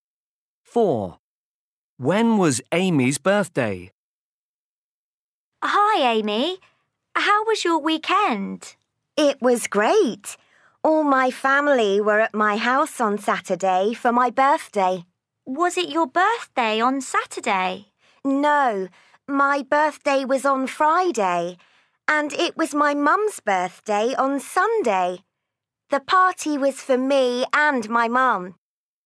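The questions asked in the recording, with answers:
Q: When was Amy's birthday?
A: On Friday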